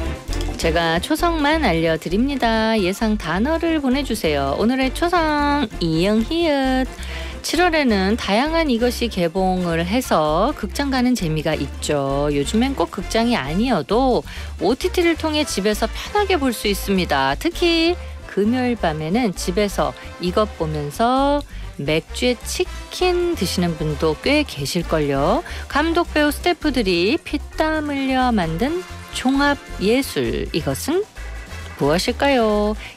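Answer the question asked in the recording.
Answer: 영화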